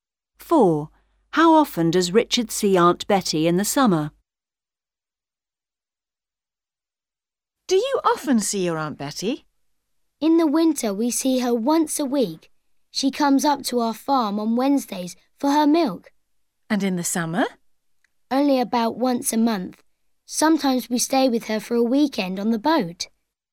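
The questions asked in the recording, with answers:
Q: How often does Richard see Aunt Betty in the summer?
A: About once a month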